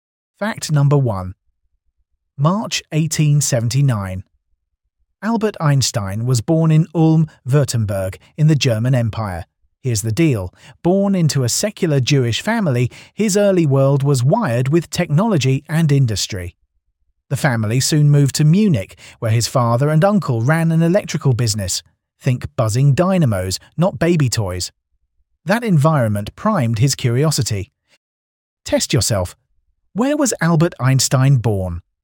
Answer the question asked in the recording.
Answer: Ulm, Württemberg, in the German Empire.